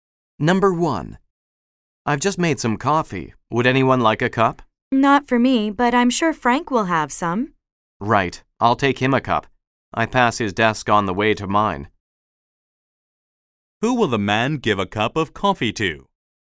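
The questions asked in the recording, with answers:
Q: Who will the man give a cup of coffee to?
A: Frank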